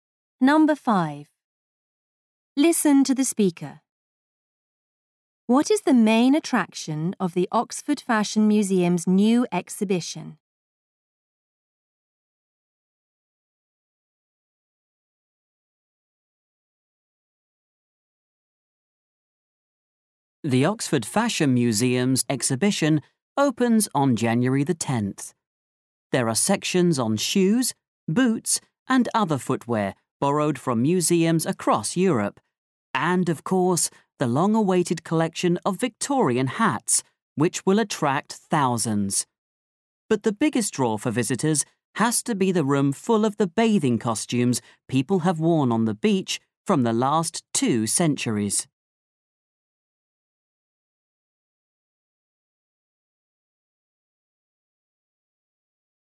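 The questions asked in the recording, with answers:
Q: What is the main attraction of the Oxford Fashion Museum's new exhibition?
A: The room of bathing costumes from the last two centuries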